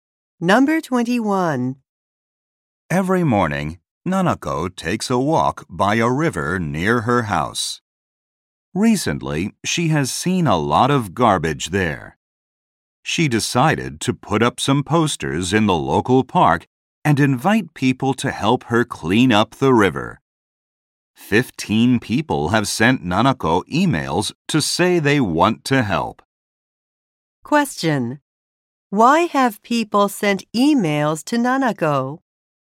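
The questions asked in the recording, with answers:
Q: Why have people sent emails to Nanako?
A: They want to help her clean up the river.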